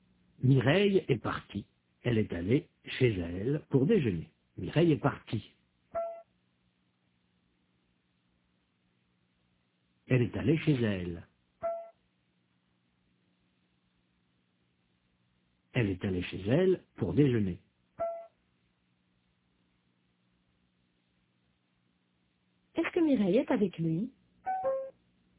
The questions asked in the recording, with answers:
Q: Est-ce que Mireille est avec lui ?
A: Non, il est seul. Mireille est partie.